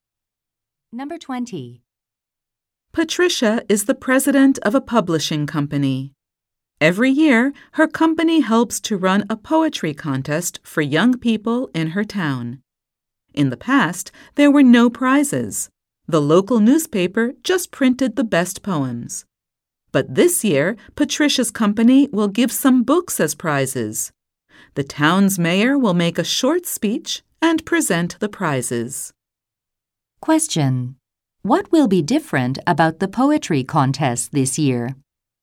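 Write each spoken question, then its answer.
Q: What will be different about the poetry contest this year?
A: Books will be given as prizes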